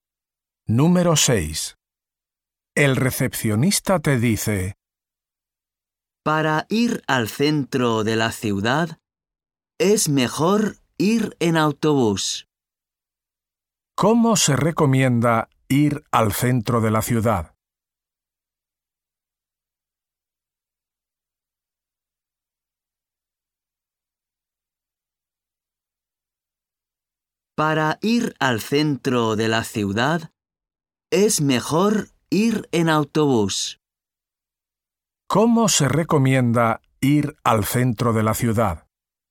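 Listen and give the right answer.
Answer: En autobús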